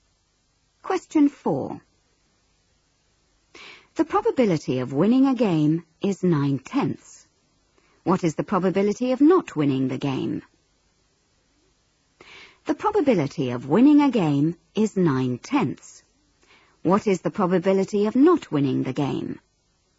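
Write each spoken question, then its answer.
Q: What is the probability of not winning the game?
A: 1/10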